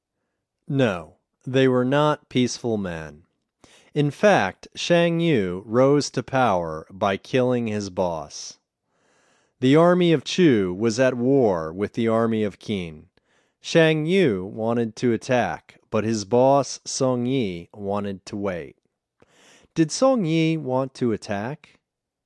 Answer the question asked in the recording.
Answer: No, he didn't want to attack.